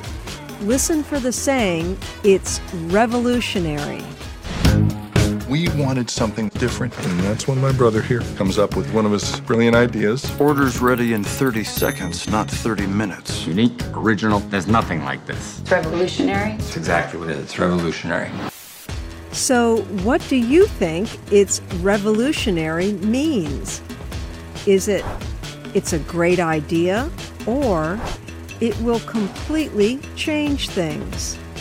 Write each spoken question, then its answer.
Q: So what do you think it's revolutionary means?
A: The term, it's revolutionary, means it will completely change things.